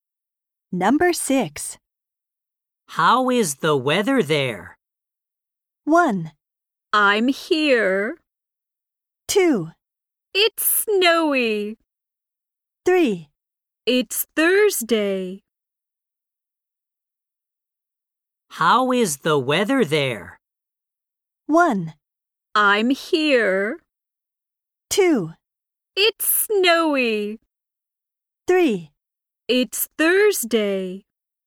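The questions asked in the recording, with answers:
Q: How is the weather there?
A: 2: It's snowy.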